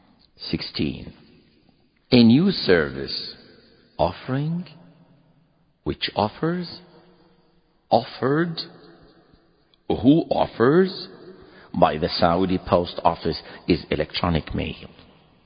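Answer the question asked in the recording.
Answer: C: offered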